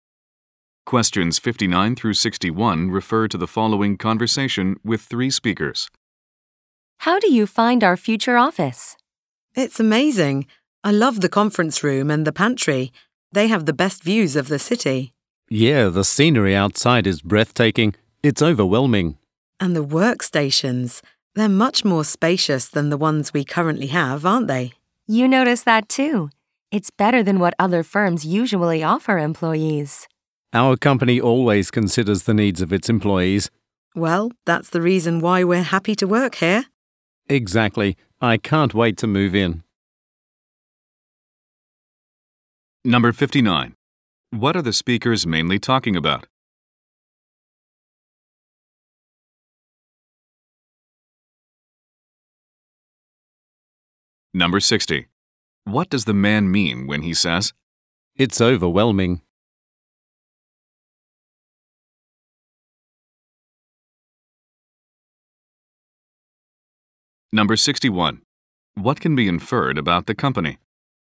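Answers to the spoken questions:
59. Their new office
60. The view is very impressive
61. It considers employees' needs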